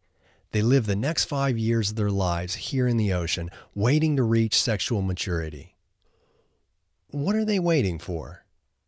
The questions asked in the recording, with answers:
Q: What are they waiting for?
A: They are waiting to reach sexual maturity